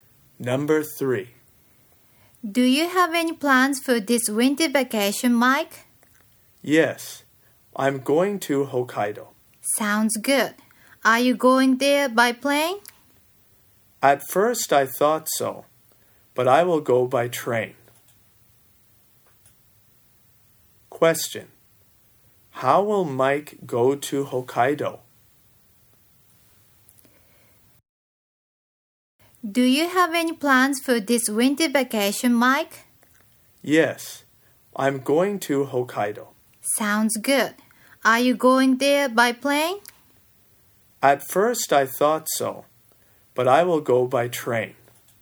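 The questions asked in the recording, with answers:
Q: How will Mike go to Hokkaido?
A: By train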